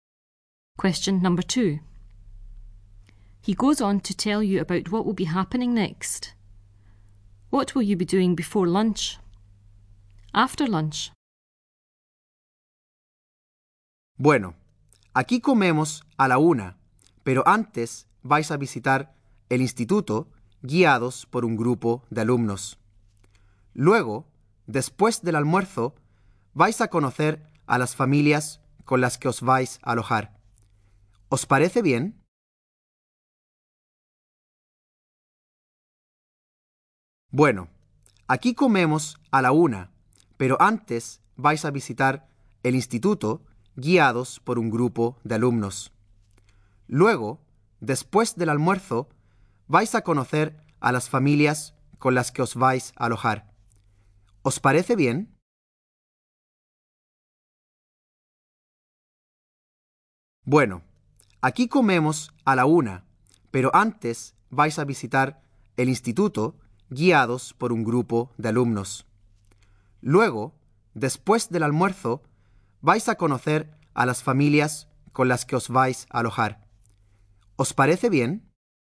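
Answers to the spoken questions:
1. Visiting the school, guided by a group of pupils
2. Meeting the families you will stay with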